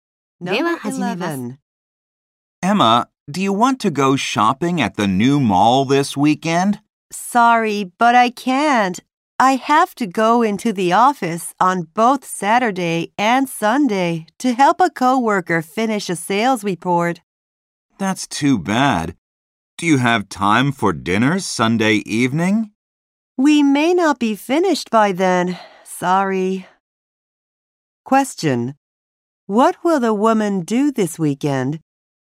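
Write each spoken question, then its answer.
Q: What will the woman do this weekend?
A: Go to the office to help a coworker finish a sales report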